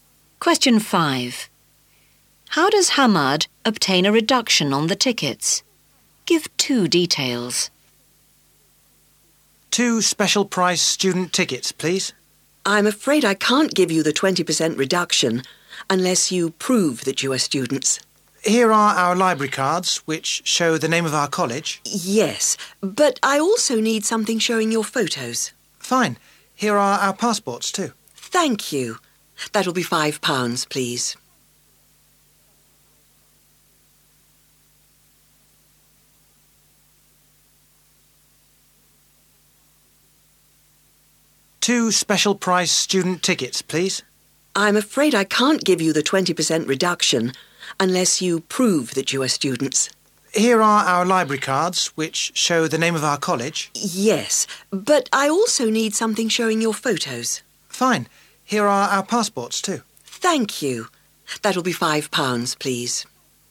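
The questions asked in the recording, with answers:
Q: How does Hamad obtain a reduction on the tickets?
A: He shows library cards and passports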